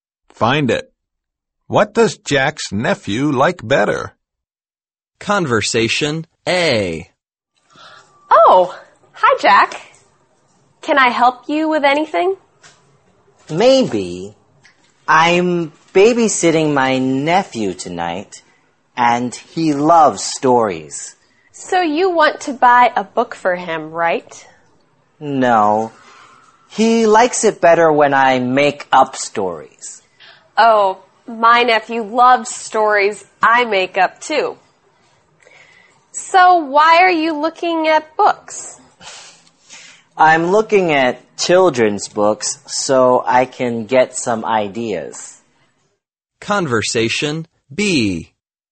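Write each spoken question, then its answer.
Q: What does Jack's nephew like better?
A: When Jack makes up stories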